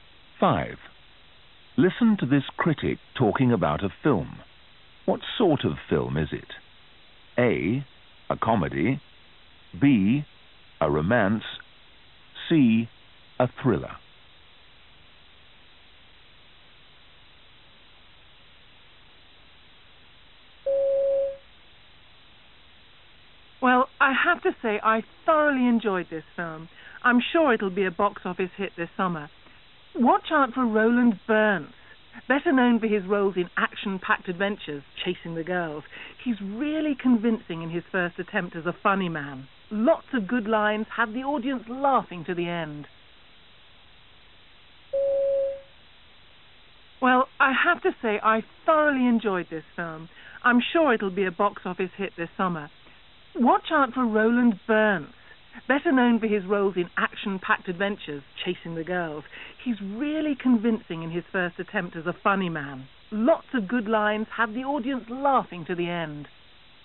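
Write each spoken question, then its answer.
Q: What sort of film is it?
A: A: A comedy.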